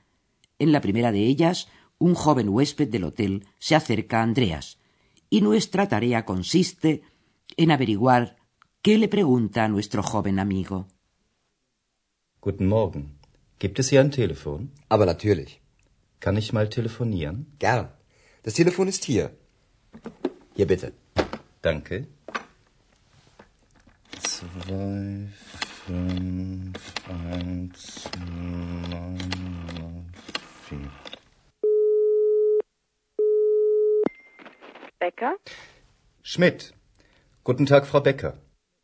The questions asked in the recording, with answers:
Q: nuestra tarea consiste en averiguar qué le pregunta a nuestro joven amigo.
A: ¿Percibieron ustedes cómo el joven preguntaba dónde había un teléfono?